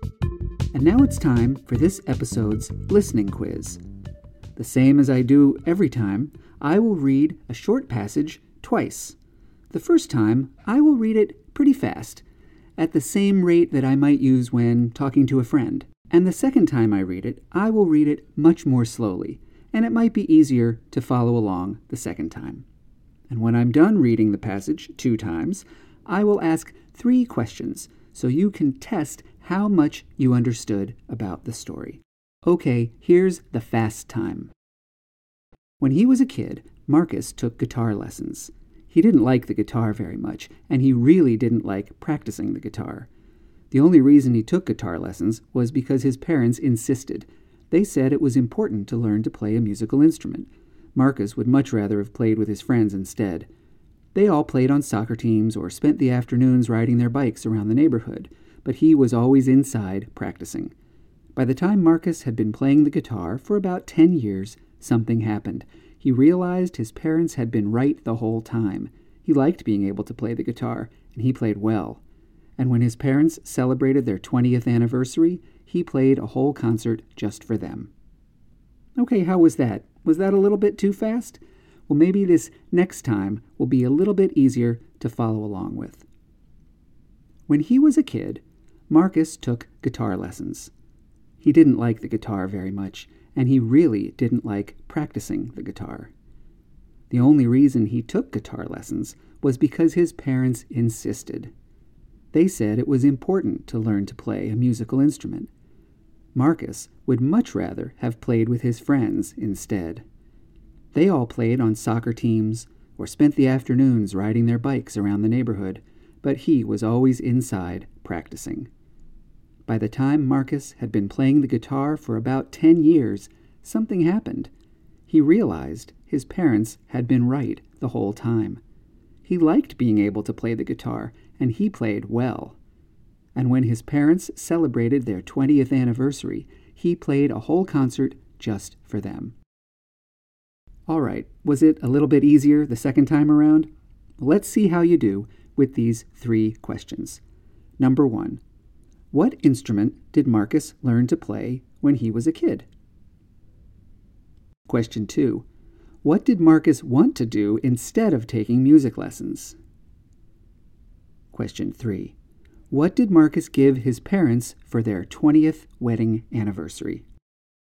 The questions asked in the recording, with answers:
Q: What instrument did Marcus learn to play when he was a kid?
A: Marcus learned to play the guitar.

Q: What did Marcus want to do instead of taking music lessons?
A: He wanted to play with his friends.

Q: What did Marcus give his parents for their 20th wedding anniversary?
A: He played a concert just for them.